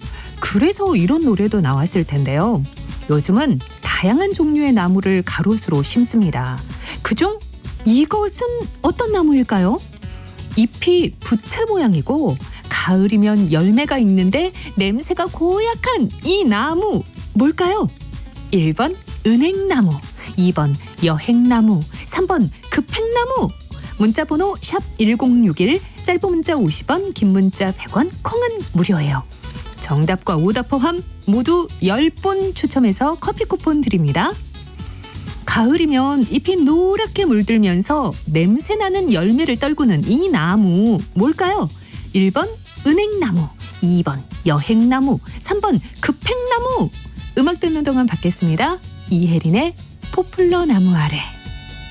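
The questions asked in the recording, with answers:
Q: 가을이면 잎이 노랗게 물들면서 냄새나는 열매를 떨구는 이 나무 뭘까요?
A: 1: 은행나무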